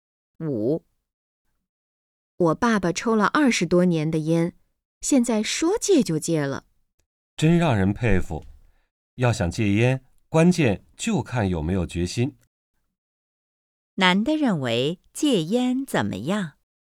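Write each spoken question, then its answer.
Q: 男的认为戒烟怎么样?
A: 关键看有没有决心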